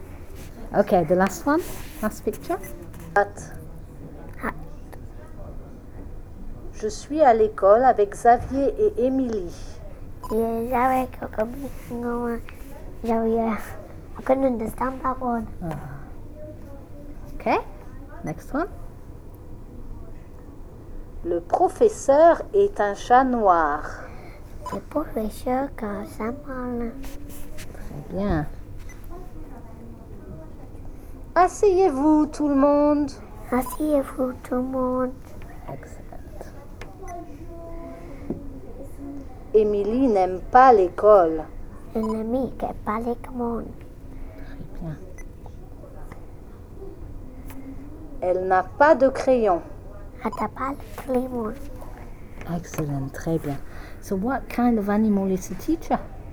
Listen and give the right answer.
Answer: A cat.